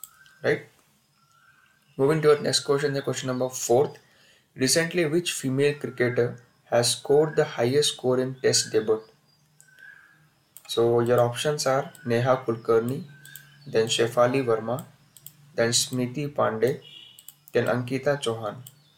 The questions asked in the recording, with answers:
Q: Recently, which female cricketer has scored the highest score in test debut.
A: So your correct answer is Shefali Verma.